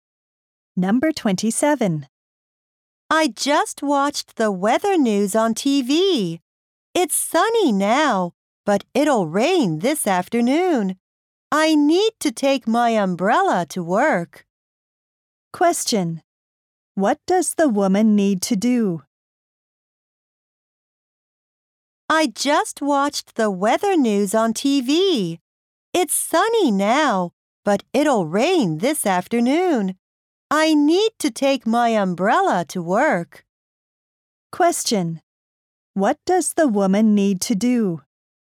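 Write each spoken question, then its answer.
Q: What does the woman need to do?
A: Take her umbrella to work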